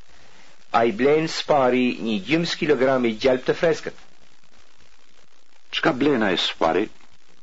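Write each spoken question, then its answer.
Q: Çka blen ai spari?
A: Gjysmë kilogrami gjalp të freskët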